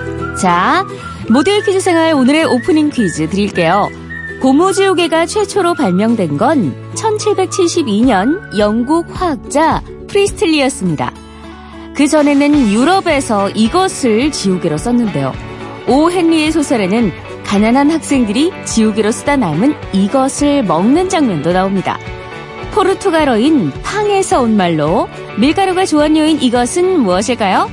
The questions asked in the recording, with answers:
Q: 포르투갈어인 팡에서 온 말로 밀가루가 조원료인 이것은 무엇일까요?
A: 정답은 뱅뱅뱅 아니고 빵이었습니다.